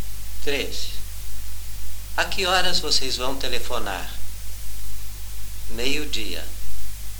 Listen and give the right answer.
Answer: Nós vamos telefonar ao 12:00.